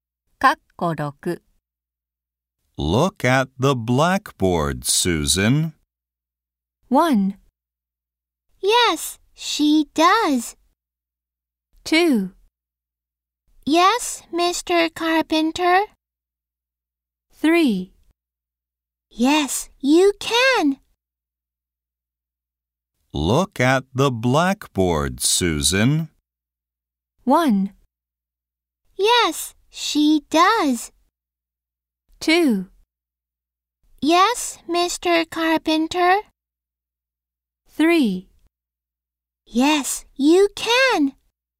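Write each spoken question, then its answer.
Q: Look at the blackboard, Susan.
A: 2: Yes, Mr. Carpenter.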